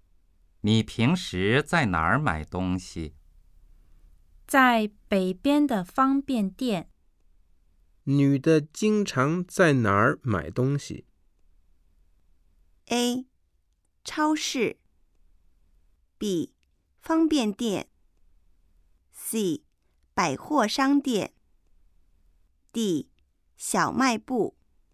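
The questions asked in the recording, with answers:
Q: 女的经常在哪儿买东西?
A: B: 方便店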